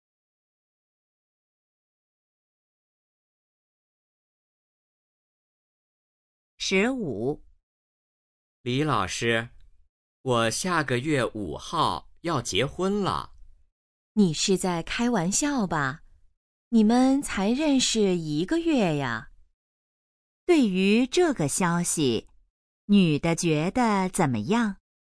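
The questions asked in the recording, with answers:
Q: 女的觉得怎么样?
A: 不相信,很吃惊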